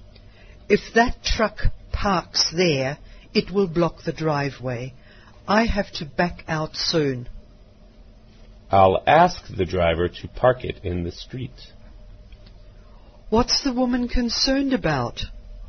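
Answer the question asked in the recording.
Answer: The truck blocking the driveway.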